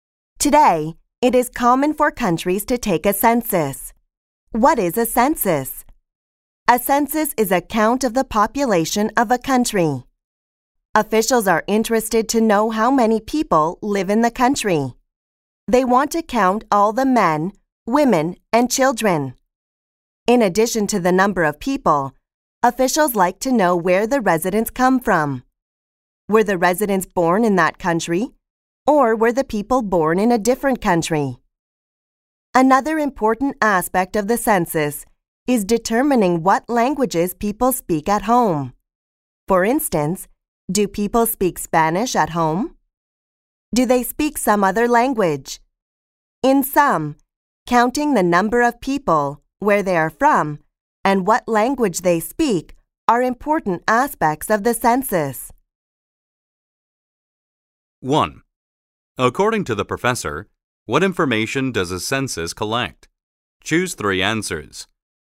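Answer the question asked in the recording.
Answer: The number of people, where residents come from, and what languages they speak at home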